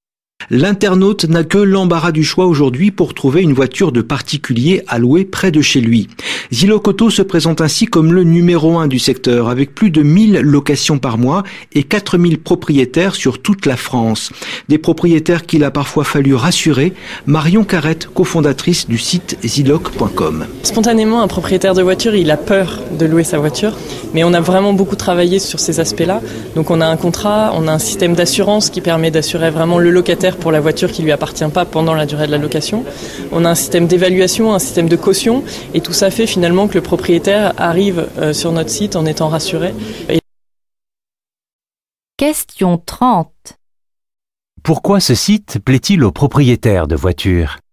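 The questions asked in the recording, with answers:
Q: Pourquoi ce site plaît-il aux propriétaires de voitures ?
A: Parce qu'ils sont rassurés : contrat, assurance, évaluation et caution les protègent.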